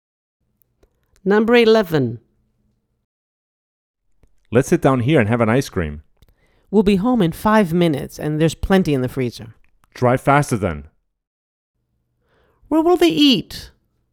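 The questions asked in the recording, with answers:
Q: Where will they eat?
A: at home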